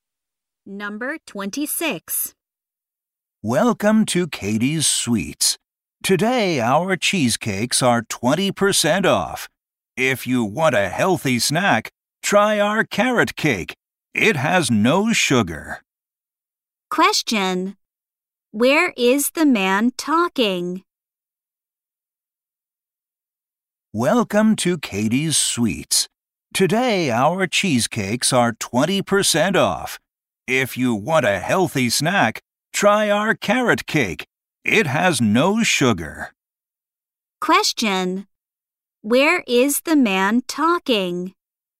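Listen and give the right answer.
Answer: At a sweets shop (Katie's Sweets).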